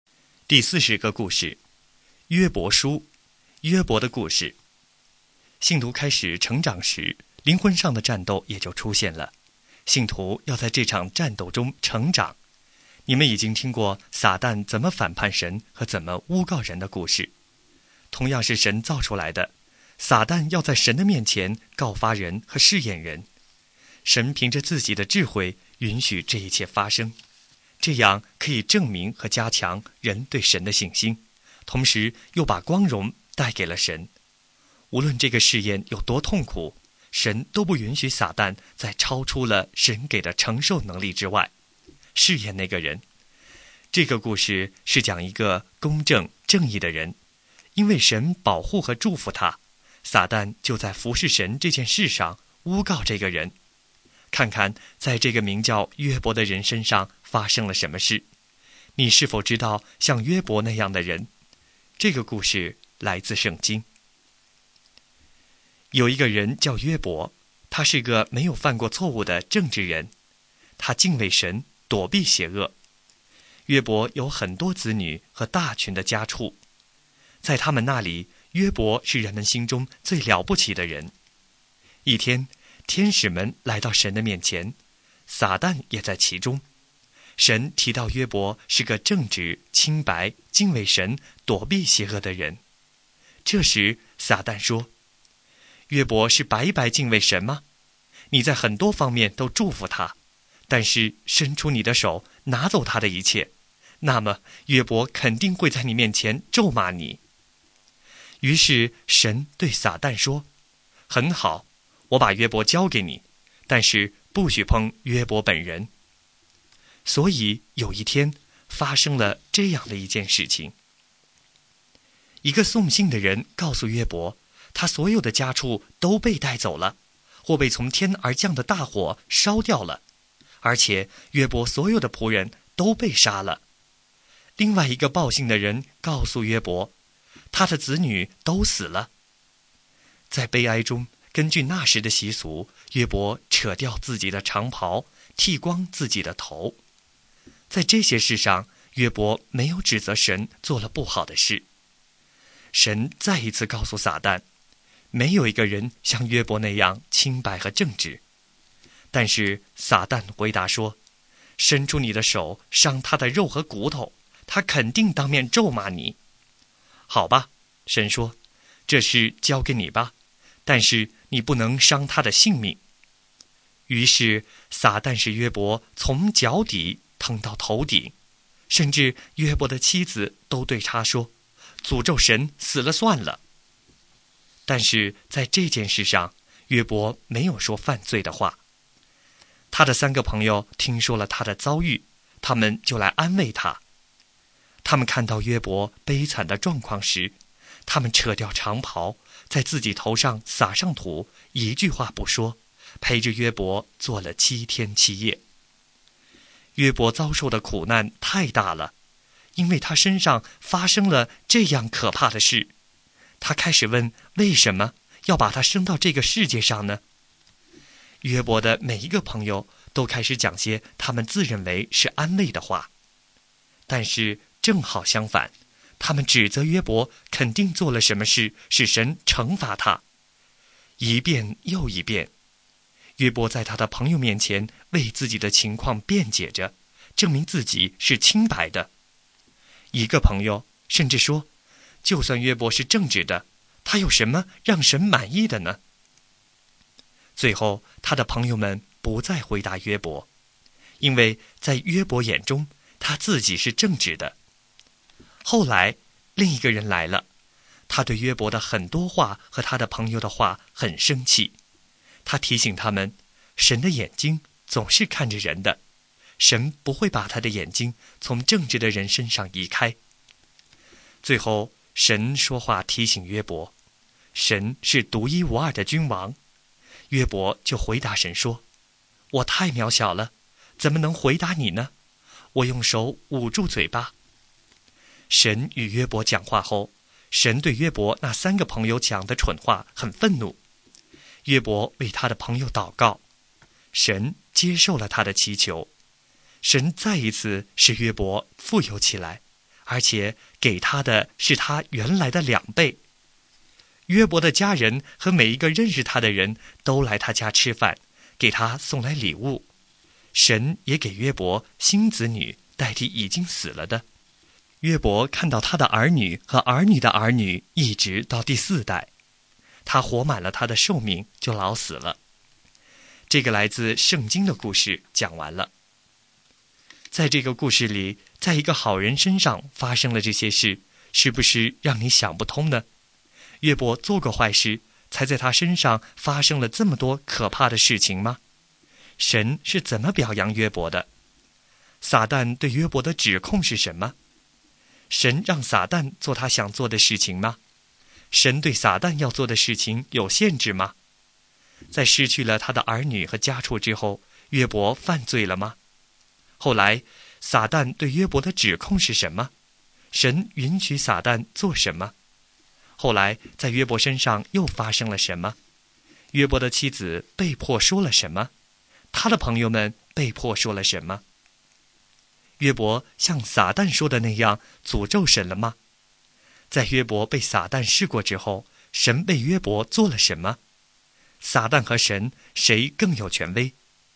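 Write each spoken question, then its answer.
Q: 约伯做过坏事,才在他身上发生了这么多可怕的事情吗?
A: 没有,约伯是正直清白的人

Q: 神是怎么表扬约伯的?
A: 说他正直、清白、敬畏神、躲避邪恶

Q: 撒旦对约伯的指控是什么?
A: 约伯敬畏神是因为神祝福他,拿走他的一切他就会咒骂神

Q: 神对撒旦要做的事情有限制吗?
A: 有,不许碰约伯本人,后来不许伤他性命

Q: 在失去了他的儿女和家畜之后,约伯犯罪了吗?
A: 没有,他没有指责神

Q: 后来,撒旦对约伯的指控是什么?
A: 伤他的肉和骨头,他就会当面咒骂神

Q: 神允许撒旦做什么?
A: 伤害约伯的身体,但不能伤他的性命

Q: 后来,在约伯身上又发生了什么?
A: 他从脚底疼到头顶

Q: 约伯的妻子被迫说了什么?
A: 诅咒神死了算了

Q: 他的朋友们被迫说了什么?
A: 指责约伯肯定做了什么事使神惩罚他

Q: 约伯像撒旦说的那样诅咒神了吗?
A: 没有

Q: 在约伯被撒旦试过之后,神为约伯做了什么?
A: 使他再次富有,给他原来的两倍,还给他新的子女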